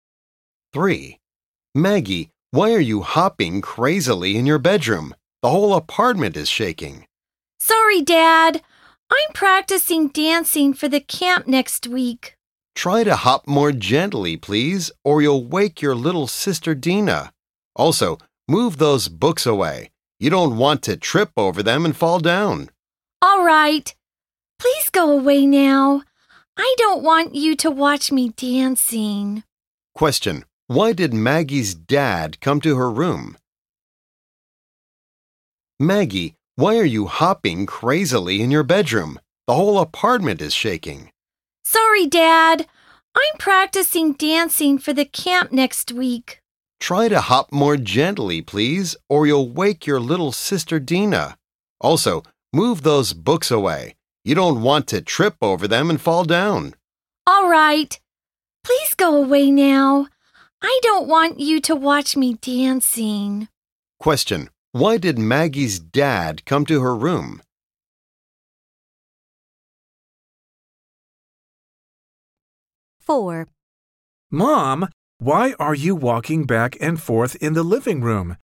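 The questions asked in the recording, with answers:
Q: Why did Maggie's dad come to her room?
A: She was hopping heavily while practicing dancing, and the apartment was shaking.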